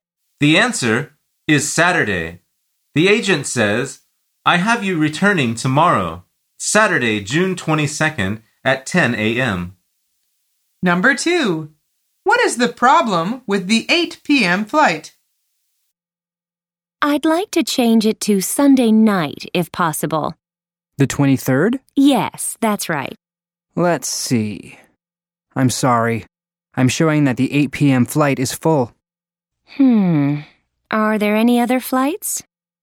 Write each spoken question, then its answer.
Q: What is the problem with the 8 p.m. flight?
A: The answer is it is full.